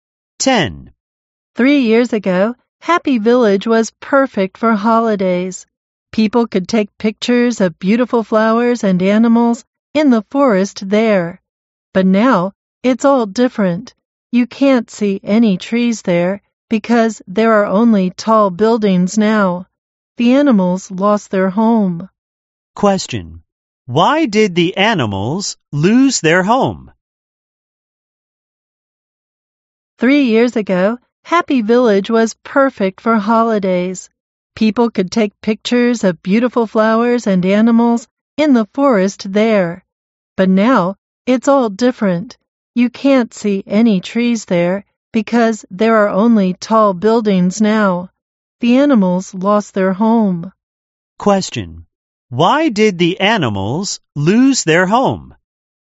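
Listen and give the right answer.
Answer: The trees were replaced by tall buildings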